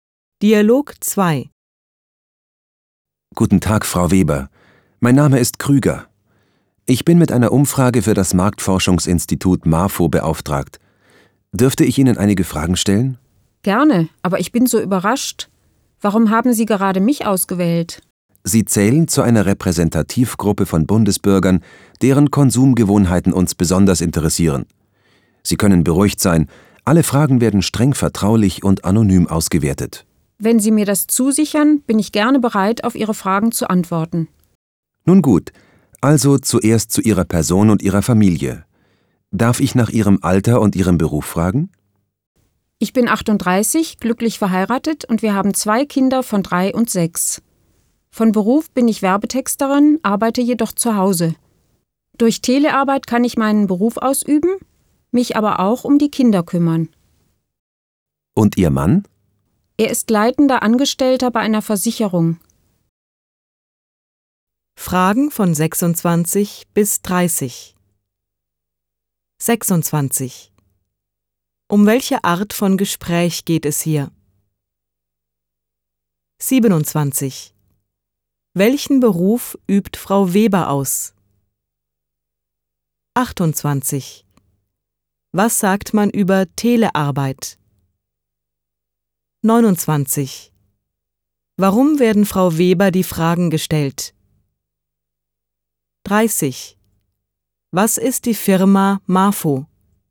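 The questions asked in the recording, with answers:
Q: Um welche Art von Gespräch geht es hier?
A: Eine Umfrage zur Marktforschung

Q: Welchen Beruf übt Frau Weber aus?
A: Werbetexterin

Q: Was sagt man über Telearbeit?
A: Man kann zu Hause arbeiten und sich um die Kinder kümmern

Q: Warum werden Frau Weber die Fragen gestellt?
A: Sie gehört zu einer Repräsentativgruppe von Bundesbürgern

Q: Was ist die Firma MAFO?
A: Ein Marktforschungsinstitut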